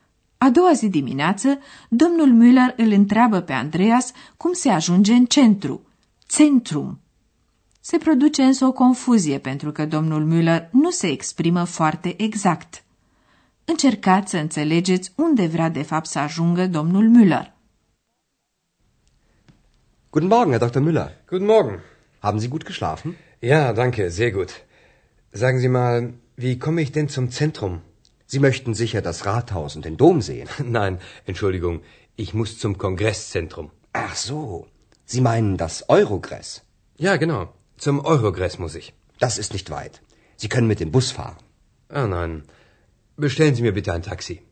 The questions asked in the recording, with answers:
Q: Încercați să înțelegeți unde vrea de fapt să ajungă domnul Müller.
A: Domnul Müller nu vrea să ajungă în centrul orașului, ci la centrul congreselor, care la Aachen se numește Eurogres.